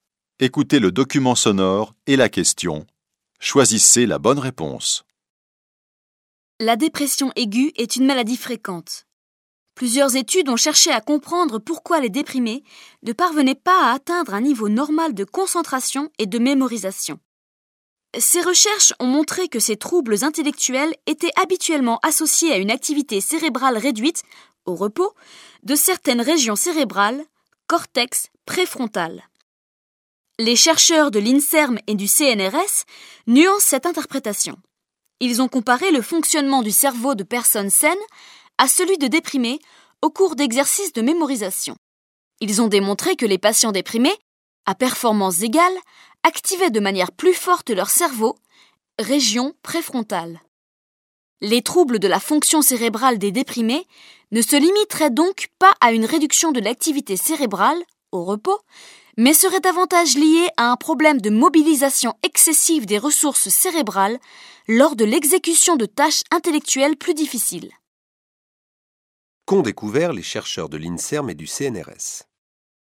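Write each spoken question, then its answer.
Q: Qu'ont découvert les chercheurs de l'INSERM et du CNRS ?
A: Qu'à performance égale, les déprimés activent plus fortement leur cerveau (région préfrontale) : une mobilisation excessive des ressources cérébrales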